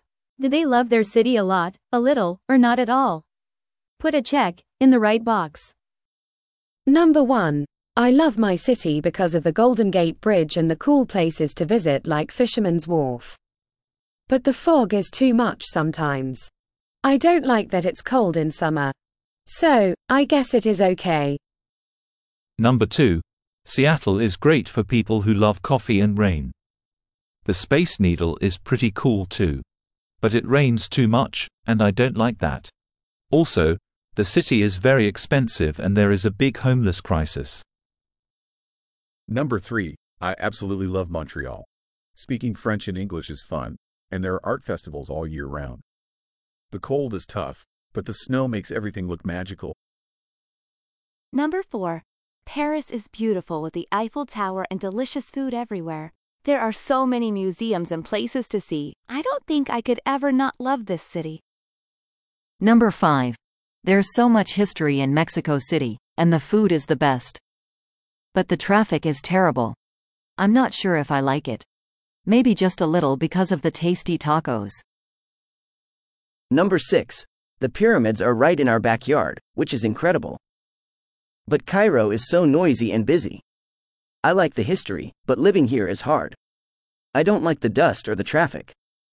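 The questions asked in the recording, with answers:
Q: Do they love their city a lot, a little, or not at all?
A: a little

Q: Do they love their city a lot, a little, or not at all?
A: a lot

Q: Do they love their city a lot, a little, or not at all?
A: a lot

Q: Do they love their city a lot, a little, or not at all?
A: a little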